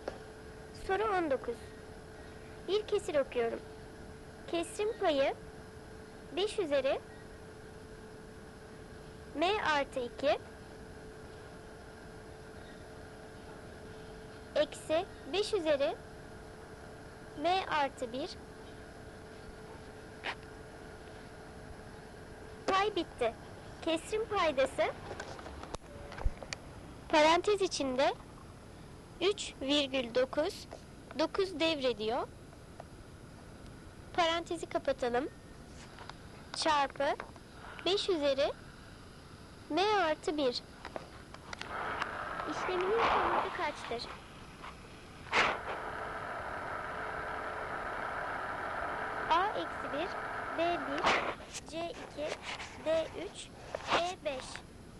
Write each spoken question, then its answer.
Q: İşleminin sonucu kaçtır?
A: Doğru cevap B 1.